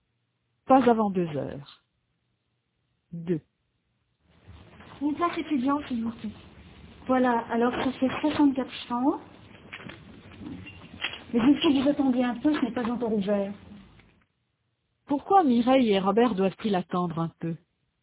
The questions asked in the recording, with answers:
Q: Pourquoi Mireille et Robert doivent-ils attendre un peu?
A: Parce que ce n'est pas encore ouvert.